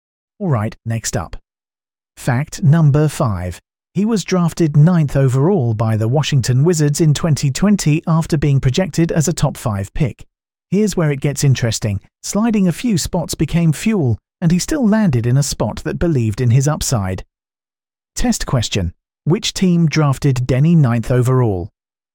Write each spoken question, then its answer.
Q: Which team drafted Denny 9th overall?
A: Correct answer. Washington Wizards.